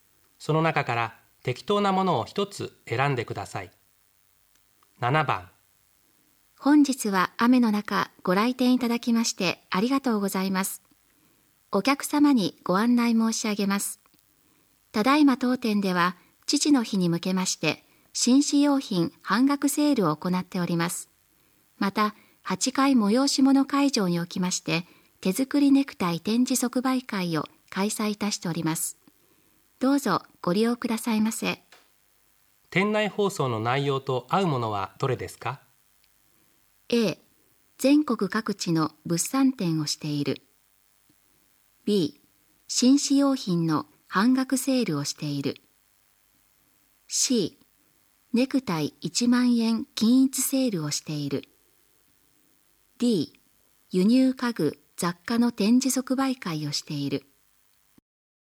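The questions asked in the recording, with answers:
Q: 店内放送の内容と合うものはどれですか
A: B: 紳士用品の半額セールをしている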